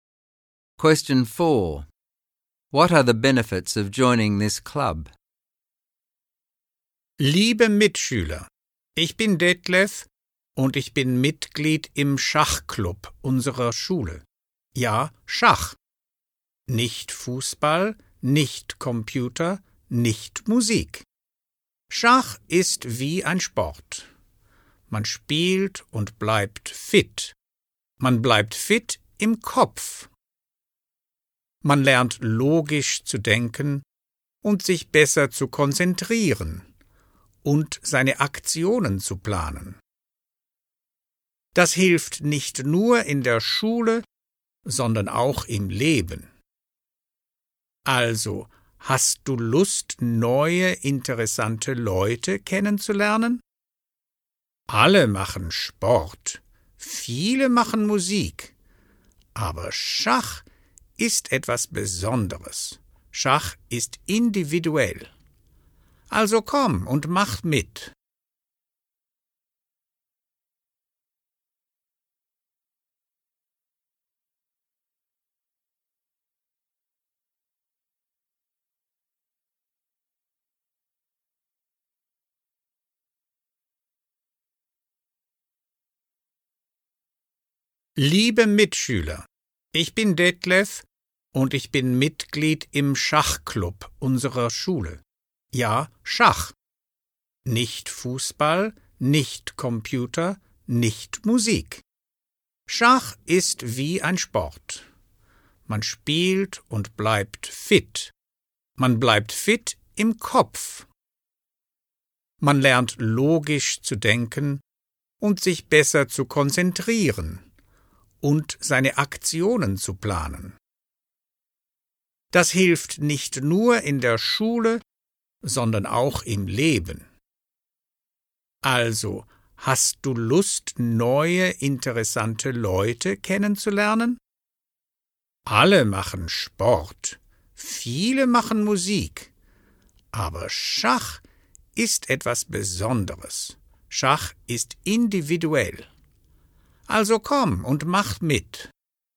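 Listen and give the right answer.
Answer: Chess keeps your mind fit, teaches logical thinking, concentration and planning, helps at school and in life, and you meet new interesting people.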